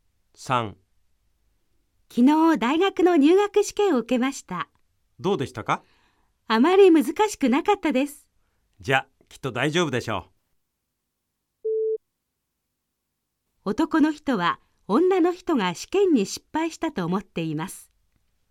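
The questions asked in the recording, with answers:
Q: 男の人は女の人が試験に失敗したと思っています。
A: ×(正しくない)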